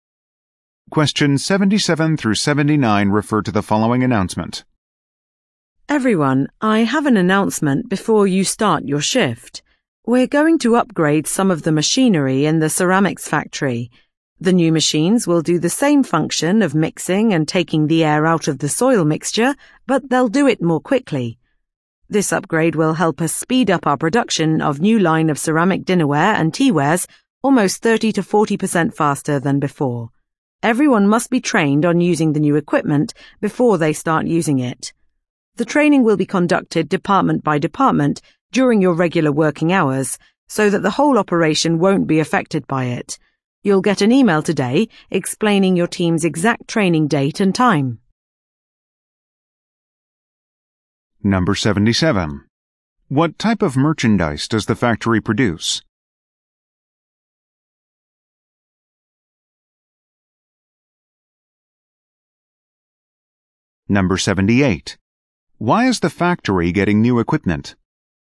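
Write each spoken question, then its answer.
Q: What type of merchandise does the factory produce?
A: Ceramic dinnerware and teaware

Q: Why is the factory getting new equipment?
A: To speed up production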